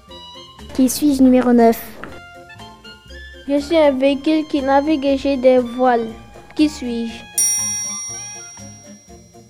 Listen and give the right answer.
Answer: Un voilier.